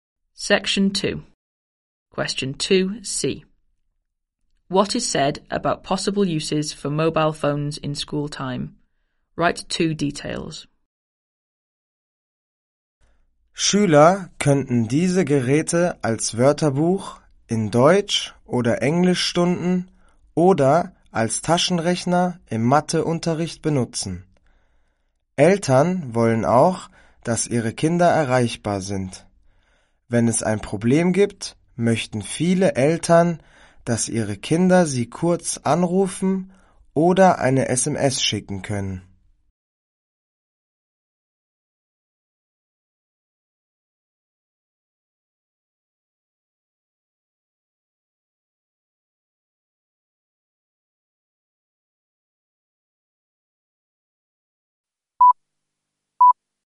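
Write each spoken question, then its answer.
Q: What is said about possible uses for mobile phones in school time?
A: As a dictionary in German or English lessons, as a calculator in maths; parents want to reach their children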